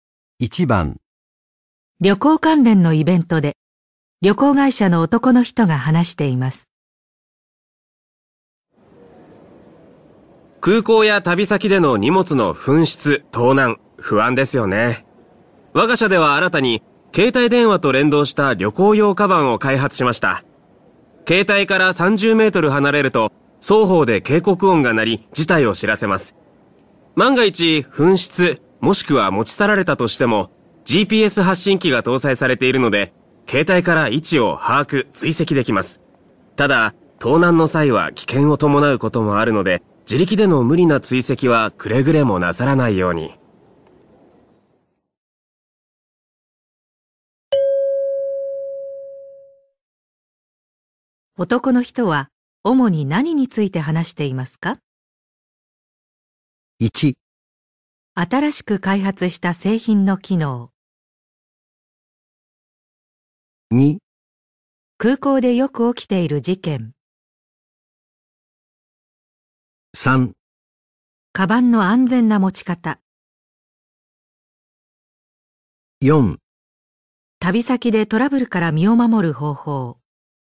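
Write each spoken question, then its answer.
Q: 男の人は主に何について話していますか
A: 1: 新しく開発した製品の機能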